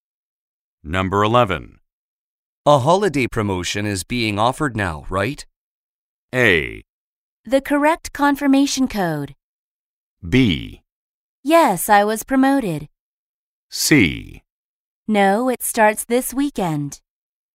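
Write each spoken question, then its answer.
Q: A holiday promotion is being offered now, right?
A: C: No, it starts this weekend.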